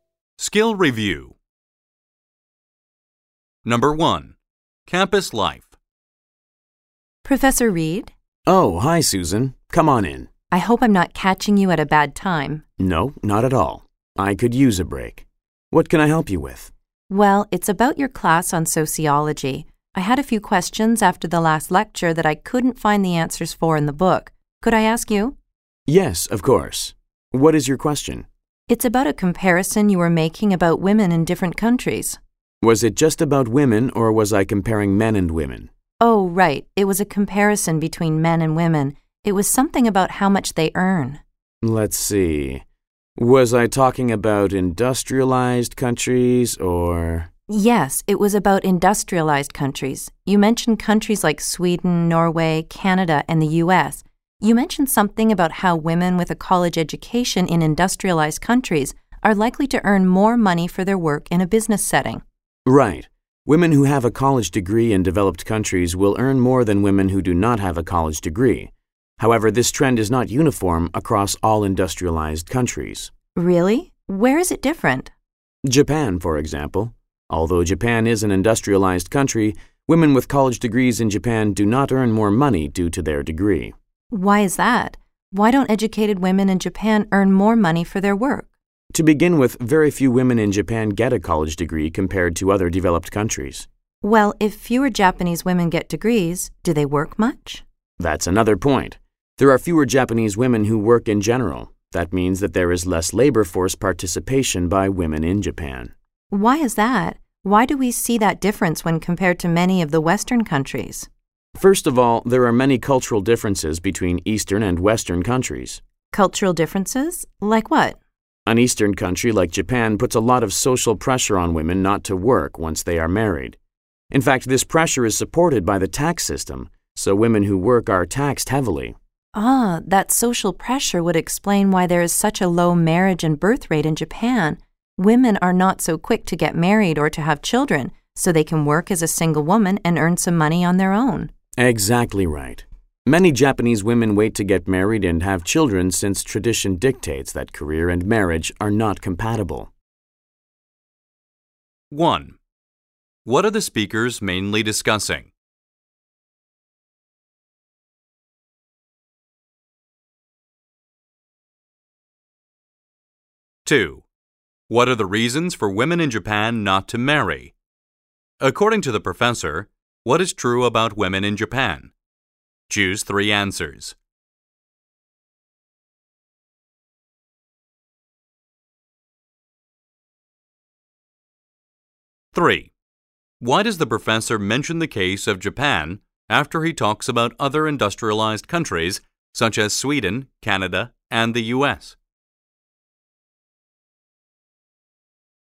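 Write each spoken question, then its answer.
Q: What are the speakers mainly discussing?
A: How much college-educated women earn in industrialized countries, and why Japan is different

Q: What are the reasons for women in Japan not to marry?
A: So they can keep working and earn their own money, since social pressure and taxes discourage married women from working

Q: Why does the professor mention the case of Japan after he talks about other industrialized countries such as Sweden, Canada, and the U.S.?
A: To show that the trend is not the same in all industrialized countries: in Japan, a degree does not mean women earn more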